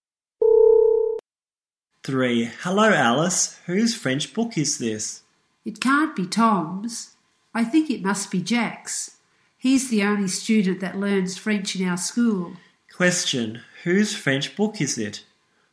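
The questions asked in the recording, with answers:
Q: Question. Whose French book is it?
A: Jack's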